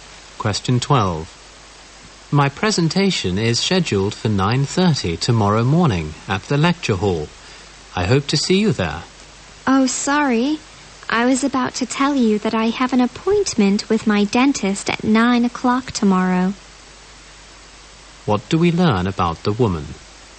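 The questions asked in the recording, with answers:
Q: What do we learn about the woman?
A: She can't attend the man's presentation because of a dentist appointment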